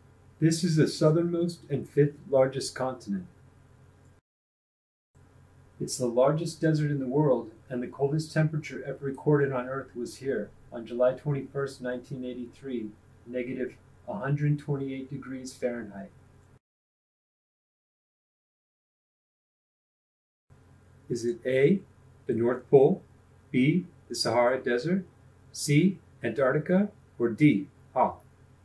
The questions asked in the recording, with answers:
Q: Is it A, the North Pole, B, the Sahara Desert, C, Antarctica, or D, Hoh?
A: If you chose Antarctica, you're correct.